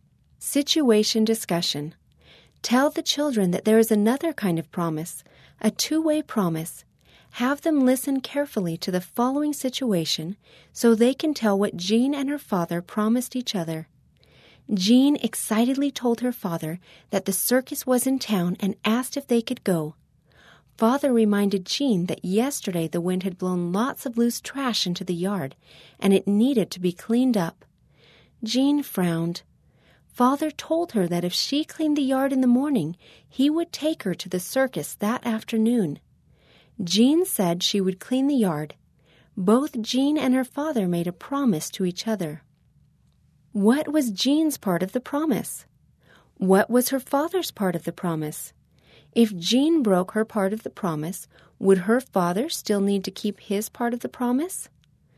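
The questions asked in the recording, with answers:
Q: What was Jean's part of the promise?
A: To clean the yard in the morning

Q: What was her father's part of the promise?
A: To take her to the circus that afternoon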